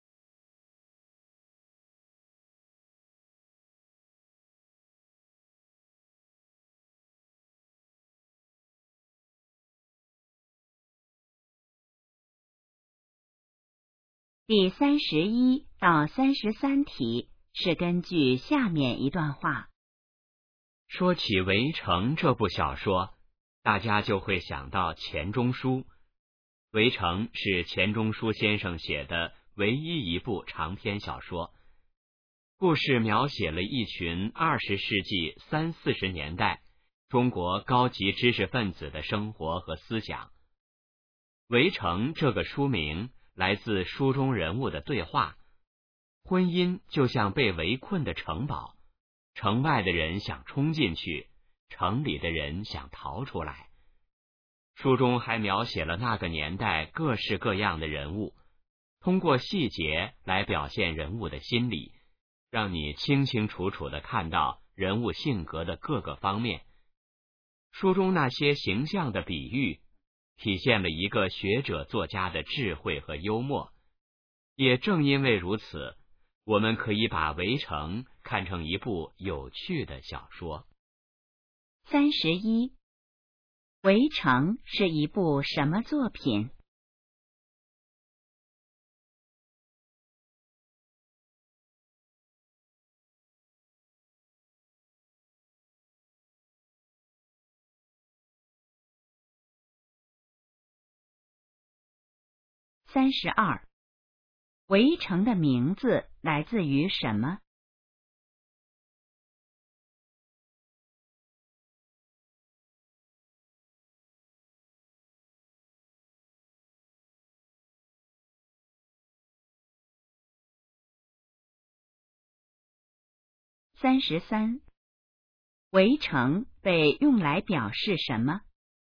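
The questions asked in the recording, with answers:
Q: 《围城》是一部什么作品?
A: 长篇小说

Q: 《围城》的名字来自于什么?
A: 书中人物的对话

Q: 《围城》被用来表示什么?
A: 婚姻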